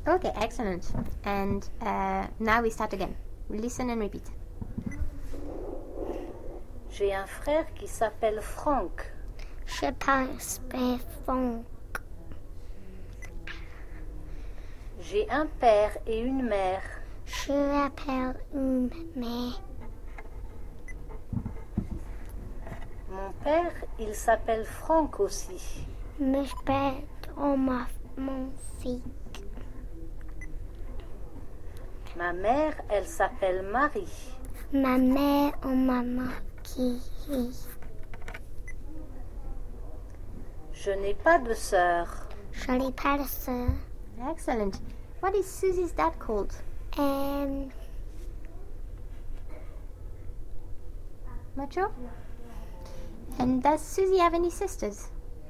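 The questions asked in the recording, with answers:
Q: What is Susie's dad called?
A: Franck

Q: And does Suzy have any sisters?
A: No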